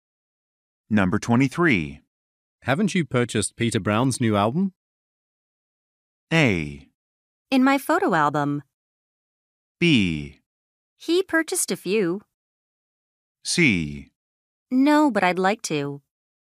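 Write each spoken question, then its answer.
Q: Haven't you purchased Peter Brown's new album?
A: C: No, but I'd like to.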